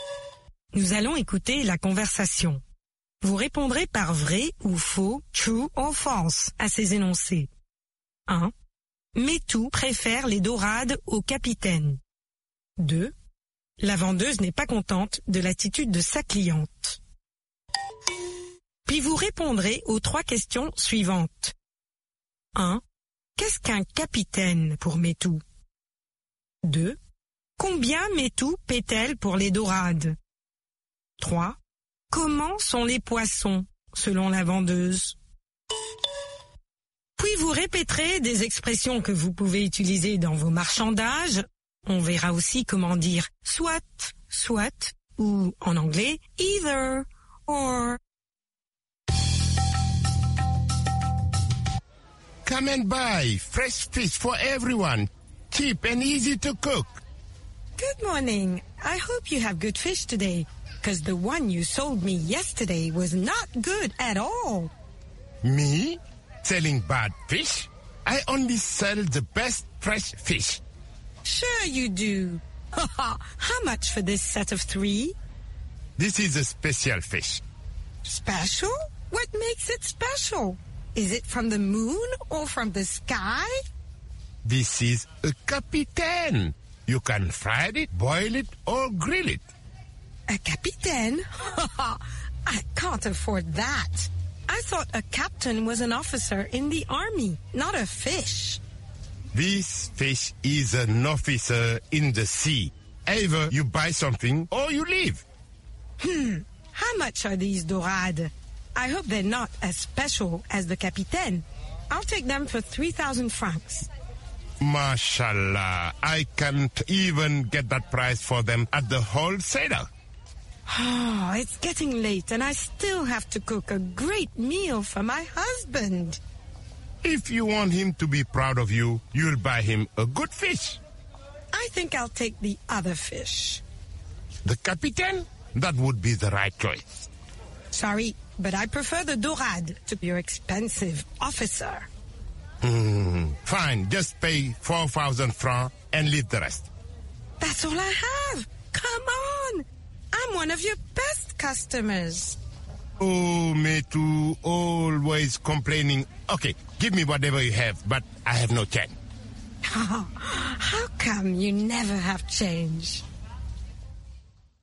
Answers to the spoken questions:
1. L'énoncé 1 est vrai. Métou préfère les dorades au capitaine.
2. L'énoncé 2 est vrai. La vendeuse n'est pas contente de l'attitude de sa cliente.
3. Pour elle, un capitaine est un officier de l'armée.
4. 3000 francs.
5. Ils sont frais.